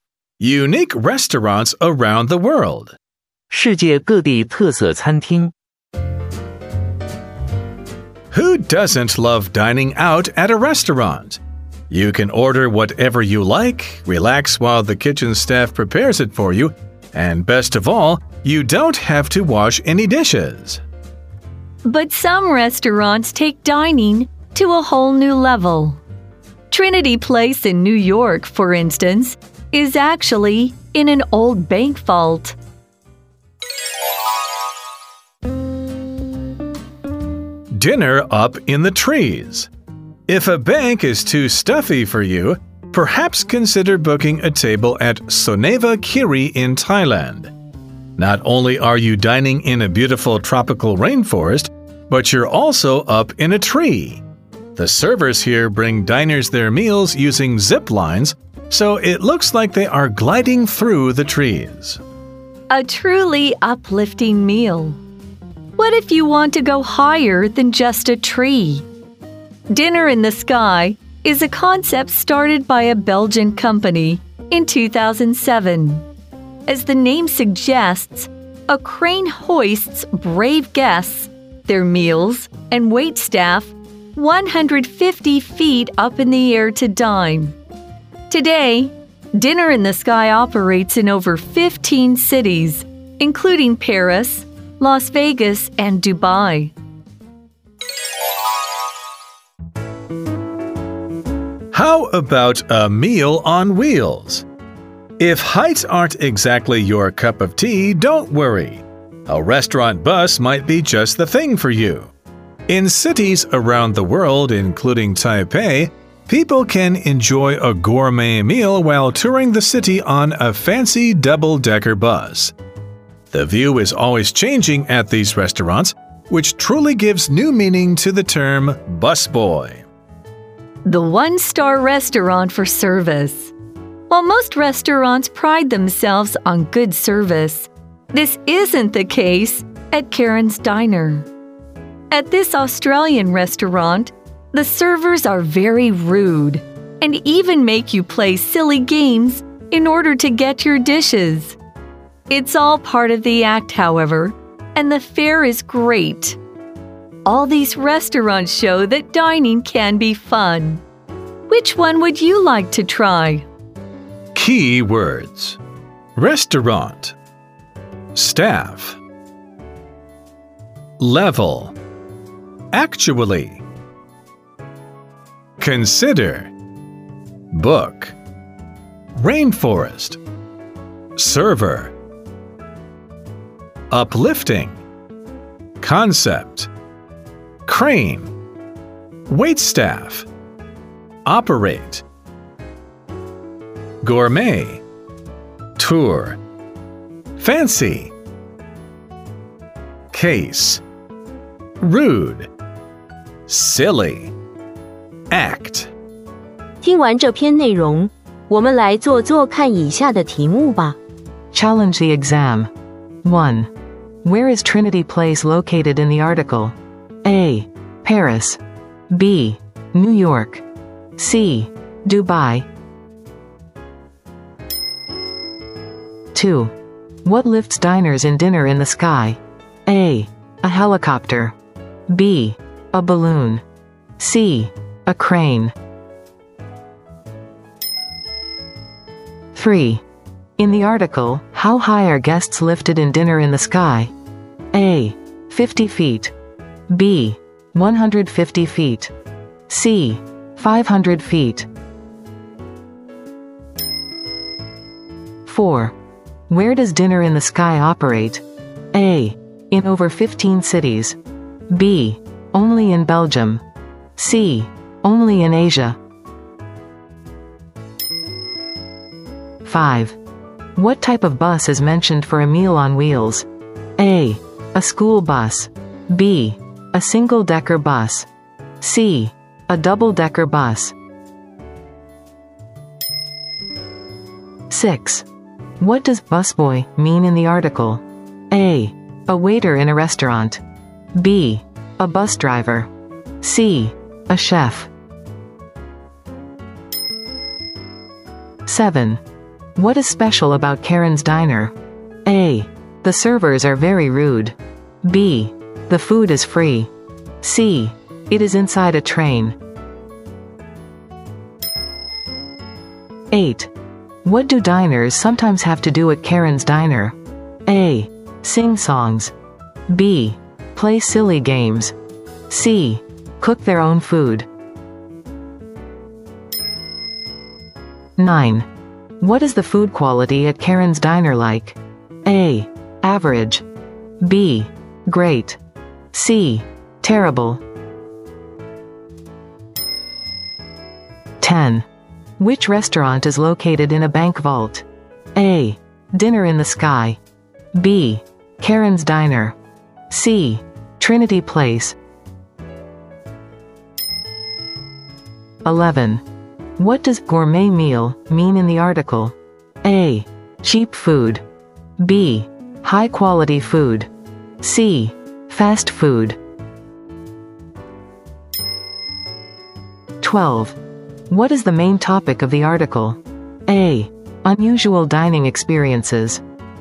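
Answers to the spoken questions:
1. B: New York
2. C: A crane
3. B: 150 feet
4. A: In over 15 cities
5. C: A double-decker bus
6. A: A waiter in a restaurant
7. A: The servers are very rude
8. B: Play silly games
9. B: Great
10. C: Trinity Place
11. B: High quality food
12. A: Unusual dining experiences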